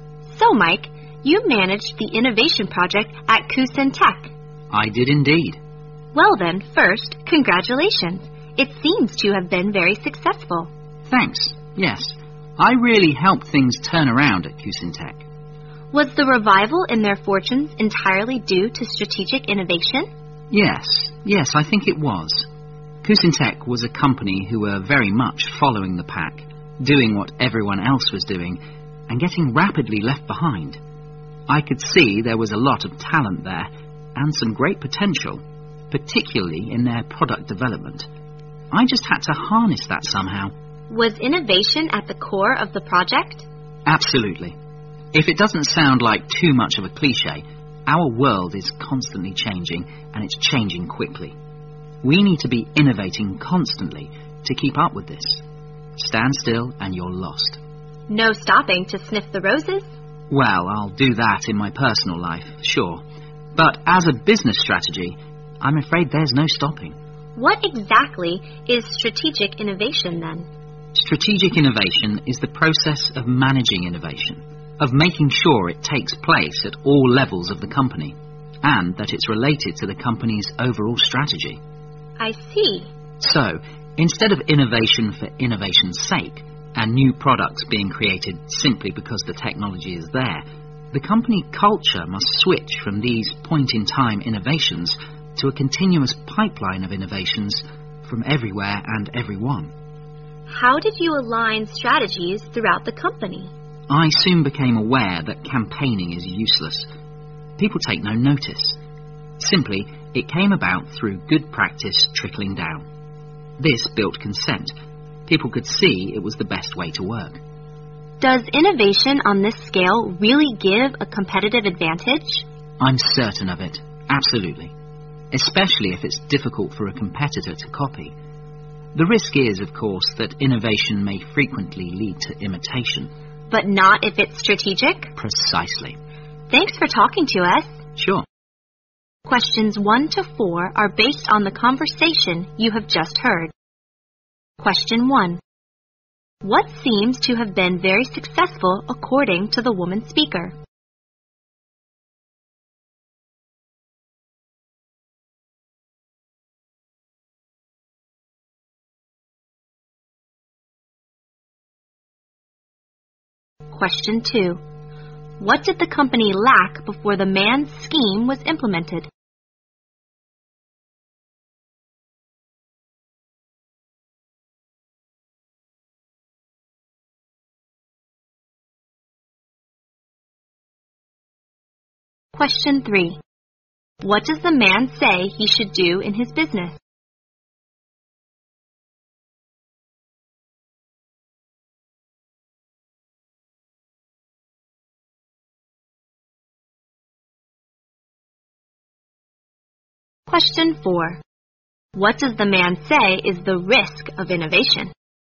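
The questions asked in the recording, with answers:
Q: What seems to have been very successful according to the woman speaker?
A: The innovation project Mike managed at Kusin Tech

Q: What does the man say he should do in his business?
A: Keep innovating constantly, with no stopping

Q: What does the man say is the risk of innovation?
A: It may frequently lead to imitation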